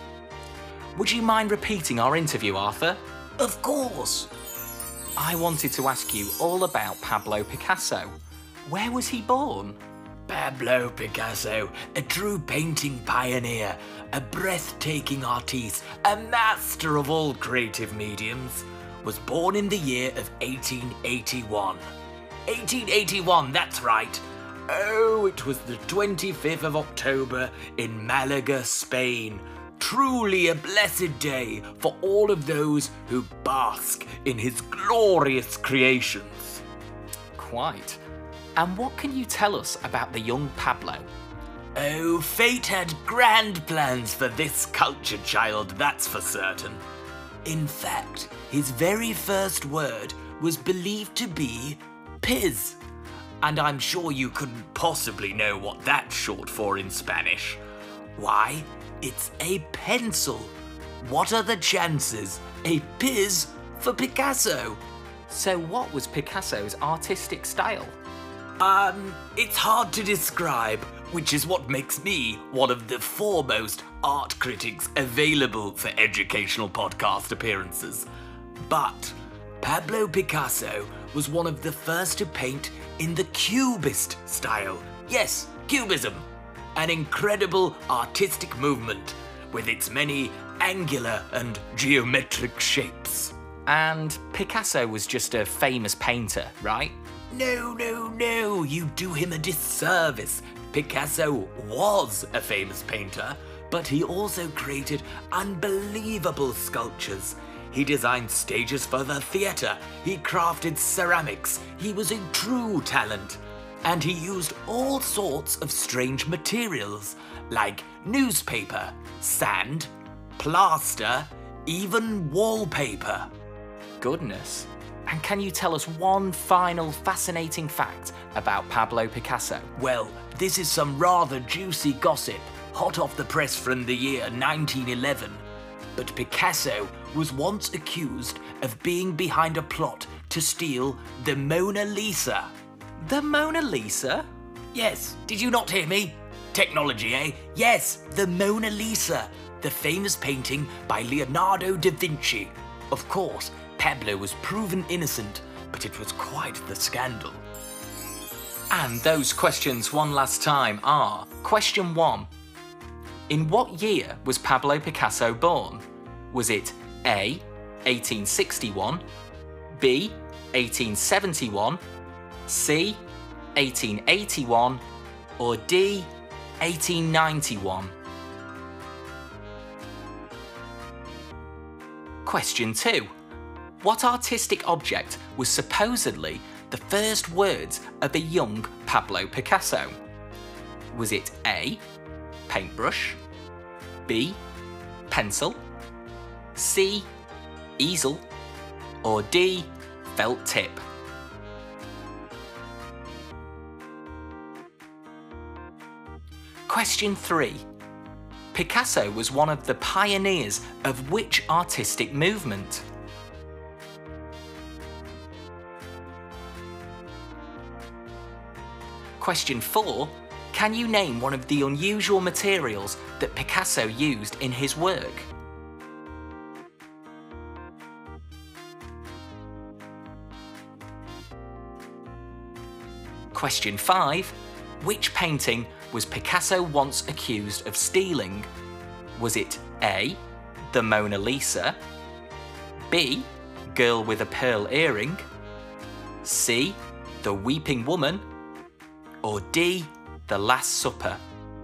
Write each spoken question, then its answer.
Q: In what year was Pablo Picasso born?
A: Well, the answer was C, 1881, on the 25th of October.

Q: What artistic object was supposedly the first words of a young Pablo Picasso?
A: It was Piz, which was the shortened form of the word pencil in Spanish, so the answer is B, pencil.

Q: Picasso was one of the pioneers of which artistic movement?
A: Cubism! Cubism, the 20th century artistic movement of gorgeous geometric shapes

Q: Can you name one of the unusual materials that Picasso used in his work?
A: They included newspaper, sand, plaster, and wallpaper.

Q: Which painting was Picasso once accused of stealing?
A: But the answer was A, the Mona Lisa.